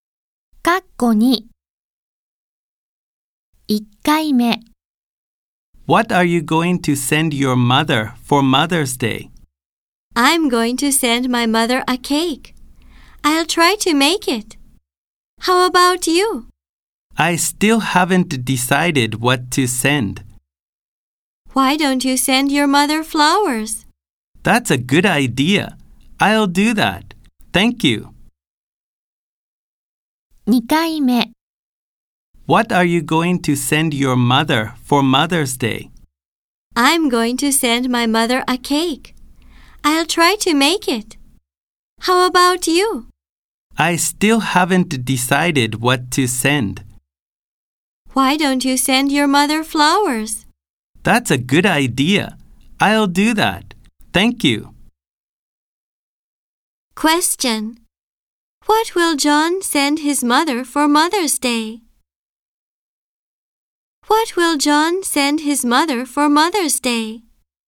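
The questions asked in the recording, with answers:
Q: What will John send his mother for Mother's Day?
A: Flowers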